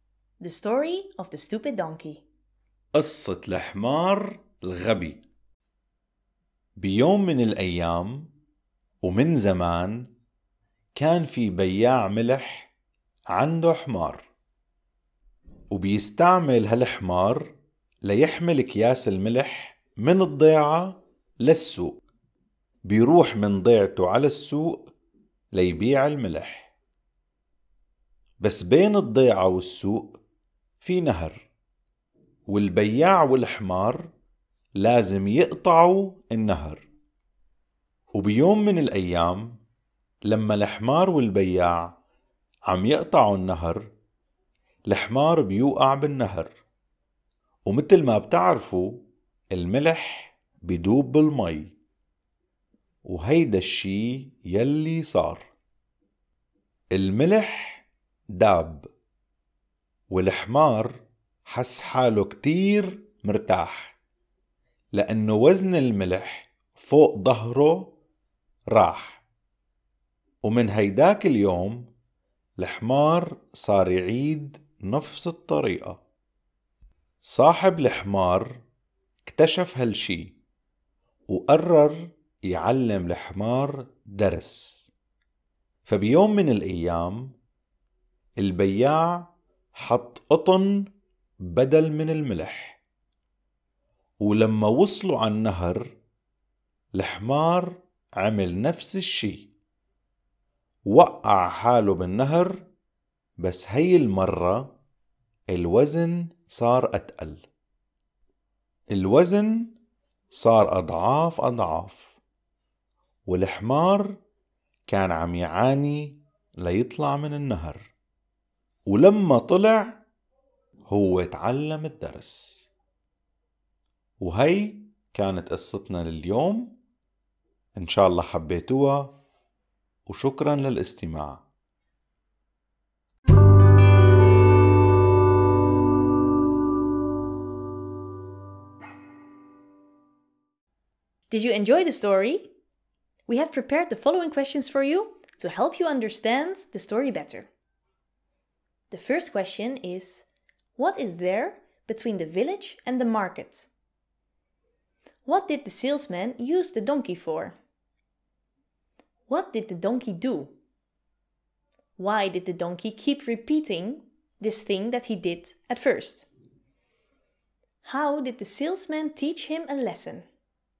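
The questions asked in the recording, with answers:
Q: what is there between the village and the market?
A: A river

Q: What did the salesman use the donkey for?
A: To carry bags of salt from the village to the market

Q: What did the donkey do?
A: It fell into the river so the salt melted

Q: Why did the donkey keep repeating this thing that he did at first?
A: Because the load got lighter when the salt melted, so he felt relieved

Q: How did the salesman teach him a lesson?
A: He loaded cotton instead of salt, so it got much heavier in the water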